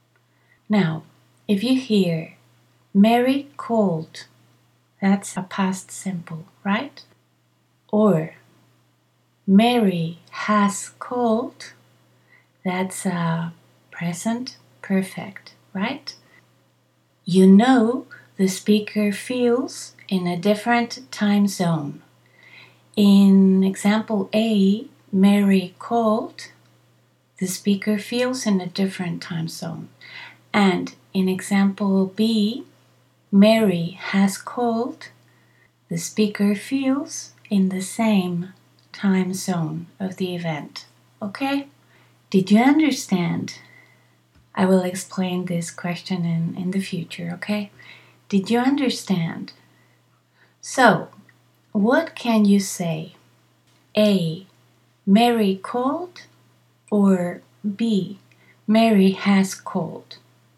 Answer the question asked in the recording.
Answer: You can say both, depending on the time zone you feel you are in, or depending on the time zone the speaker feels he or she is in.